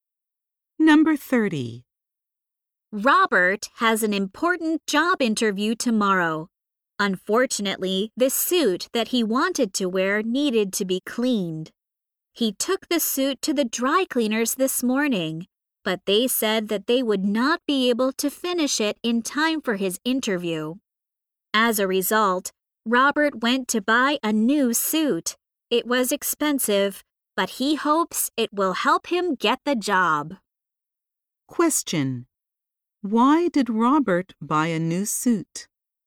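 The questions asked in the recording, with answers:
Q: Why did Robert buy a new suit?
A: The dry cleaners could not clean his suit in time for his interview.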